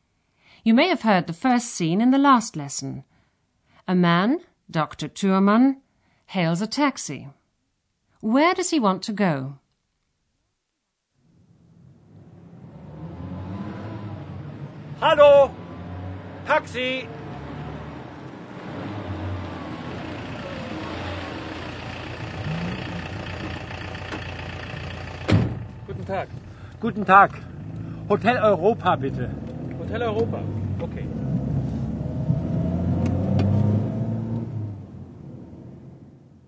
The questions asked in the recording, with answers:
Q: Where does he want to go?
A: Dr. Thürmann asks the taxi driver to take him to a hotel, the Hotel Europa.